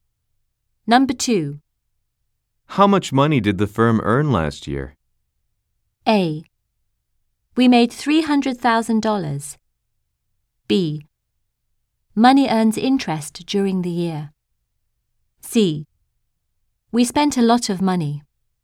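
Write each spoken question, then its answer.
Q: How much money did the firm earn last year?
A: A: We made $300,000.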